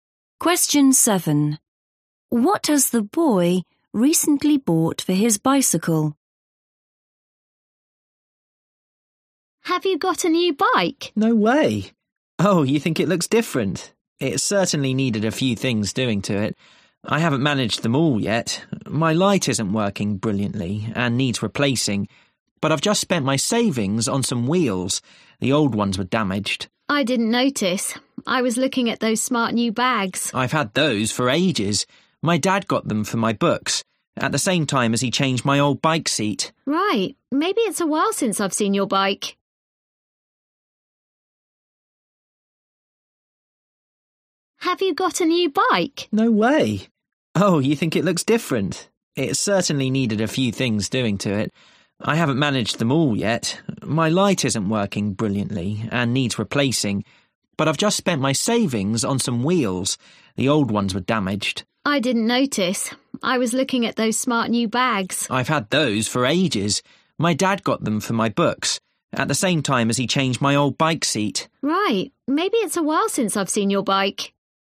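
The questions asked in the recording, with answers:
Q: What has the boy recently bought for his bicycle?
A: wheels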